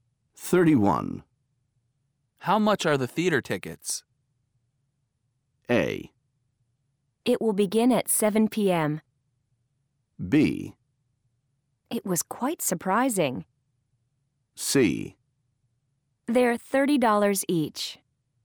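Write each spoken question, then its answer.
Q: How much are the theater tickets?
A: C: They're $30 each.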